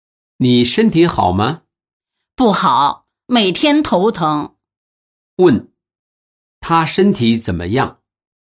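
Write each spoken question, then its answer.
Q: 他身体怎么样?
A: 不好,每天头疼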